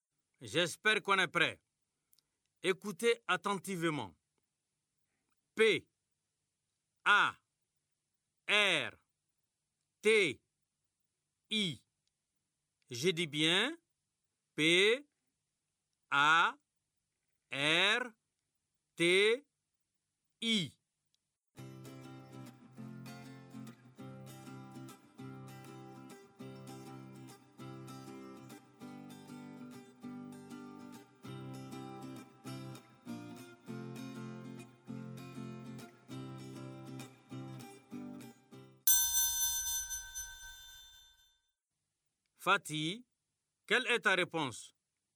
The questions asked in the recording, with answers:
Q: Fatih, quelle est ta réponse?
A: P, A, R, T, I. C'est parti.